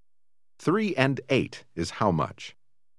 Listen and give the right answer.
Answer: 11.